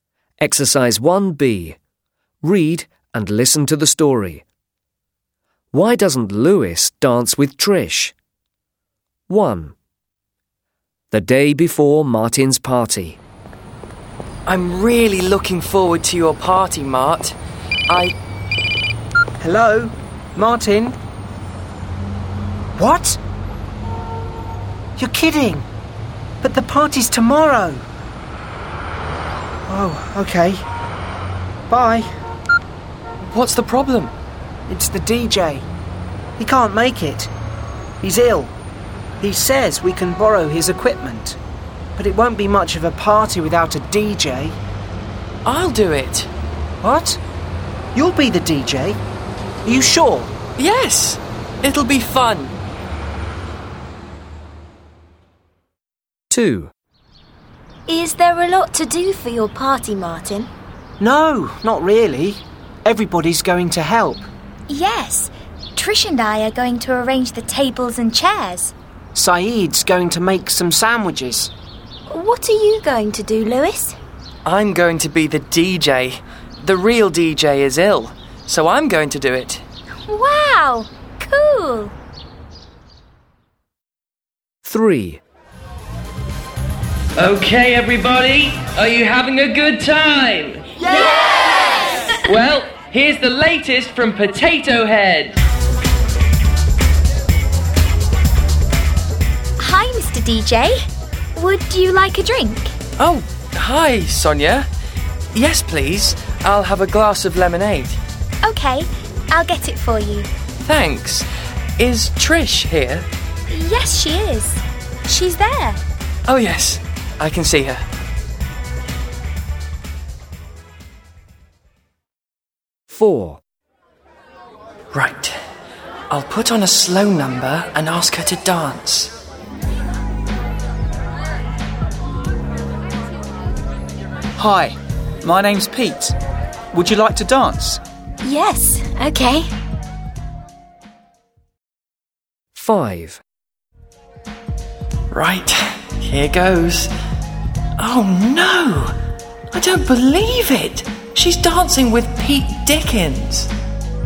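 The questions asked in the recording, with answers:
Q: Why doesn't Lewis dance with Trish?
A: Because Pete asks her to dance first, so she dances with Pete.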